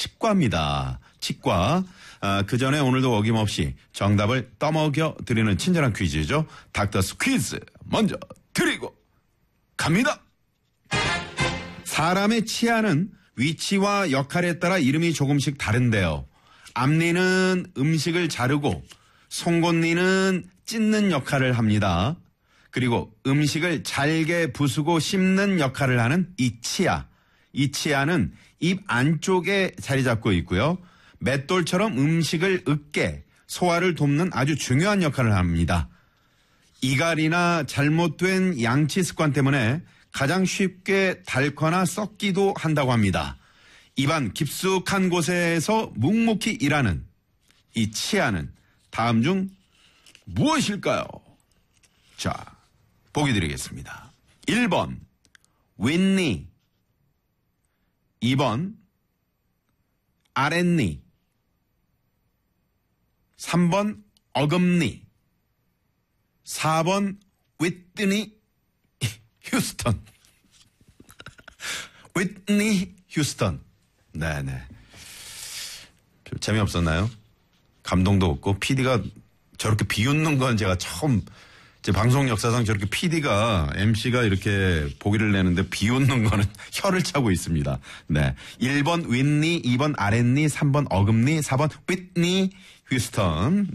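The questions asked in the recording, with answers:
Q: 입안 깊숙한 곳에서 묵묵히 일하는 이 치아는 다음 중 무엇일까요?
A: 3: 어금니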